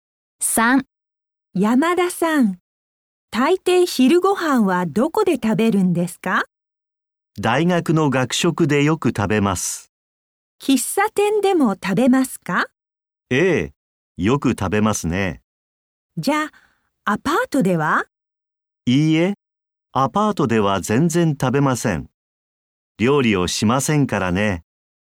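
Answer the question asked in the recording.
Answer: 大学の学食と喫茶店(アパートでは食べない)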